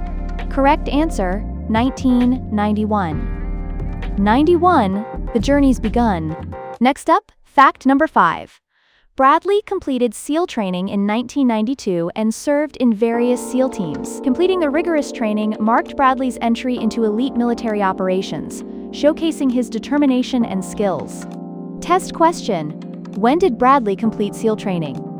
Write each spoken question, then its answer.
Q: When did Bradley complete SEAL training?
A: Correct answer, 1992.